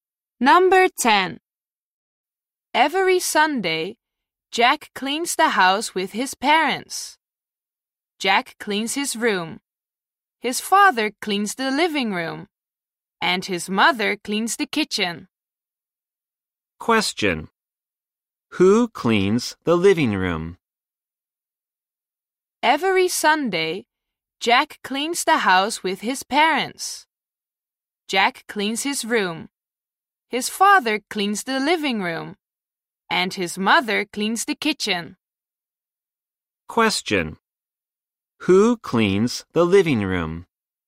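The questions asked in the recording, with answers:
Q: Who cleans the living room?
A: Jack's father.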